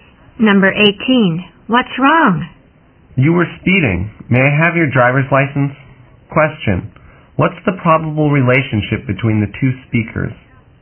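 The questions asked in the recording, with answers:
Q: What's the probable relationship between the two speakers?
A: Driver and police officer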